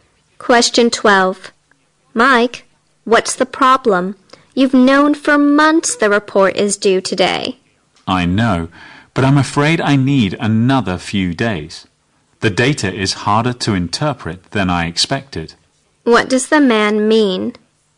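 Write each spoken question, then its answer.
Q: What does the man mean?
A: He needs a few more days to finish the report.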